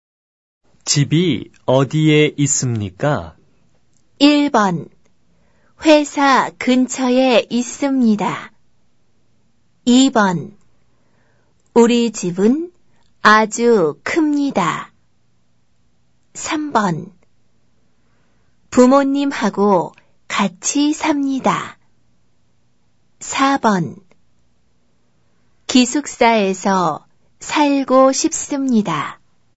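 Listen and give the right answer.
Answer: 1: 회사 근처에 있습니다.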